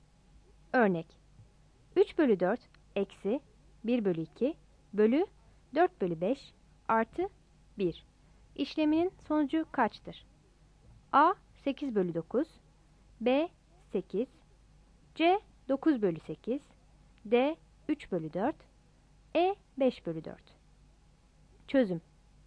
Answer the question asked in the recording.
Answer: Yanıt C'dir.